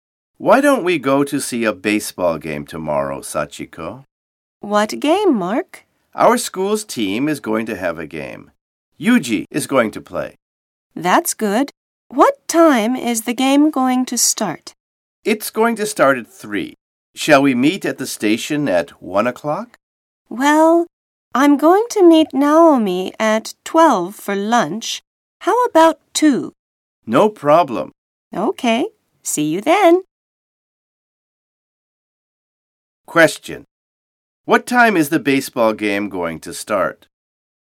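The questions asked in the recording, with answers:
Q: What time is the baseball game going to start?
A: At 3 o'clock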